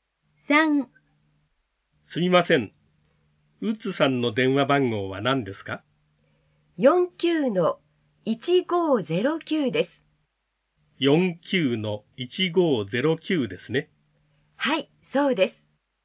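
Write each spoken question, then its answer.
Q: すみません。ウッズさんの電話番号は何ですか?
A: 49-1509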